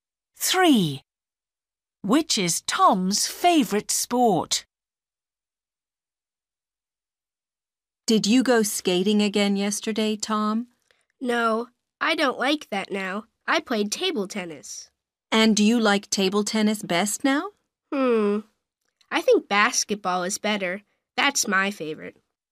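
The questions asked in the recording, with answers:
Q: Which is Tom's favorite sport?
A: Basketball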